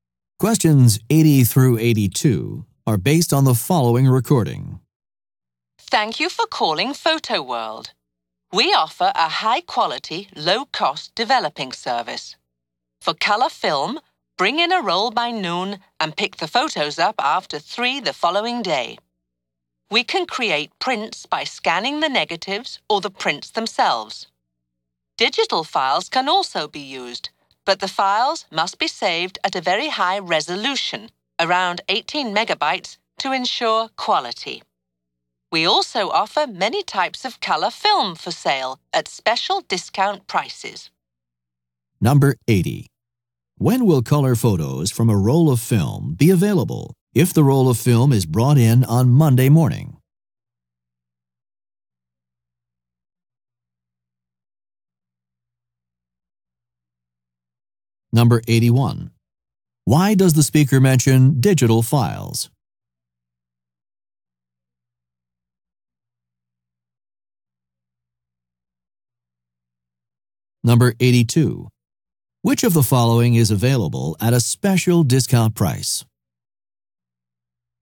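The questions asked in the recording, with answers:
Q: When will color photos from a roll of film be available if the roll of film is brought in on Monday morning?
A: After 3 on Tuesday

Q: Why does the speaker mention digital files?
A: They can be used to make prints if saved at high resolution

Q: Which of the following is available at a special discount price?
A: Color film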